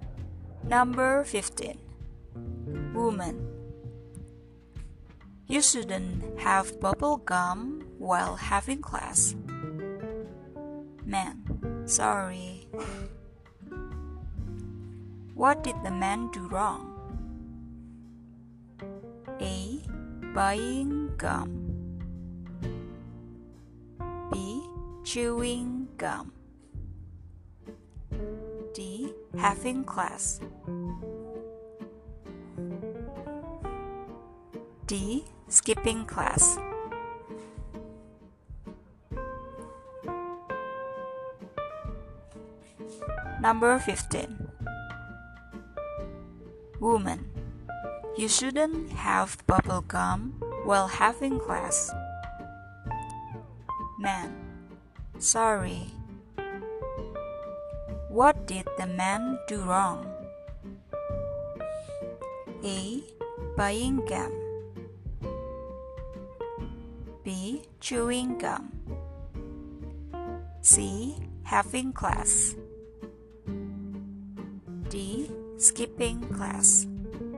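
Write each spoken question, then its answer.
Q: What did the man do wrong?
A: B: Chewing gum.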